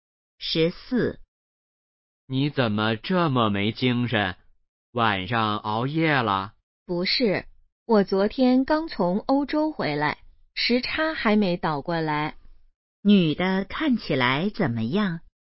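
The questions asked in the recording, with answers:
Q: 女的看起来怎么样?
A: 没精神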